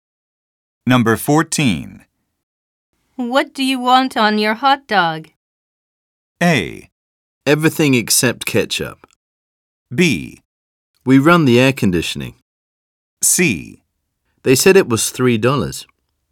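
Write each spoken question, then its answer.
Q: What do you want on your hot dog?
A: A: Everything except ketchup.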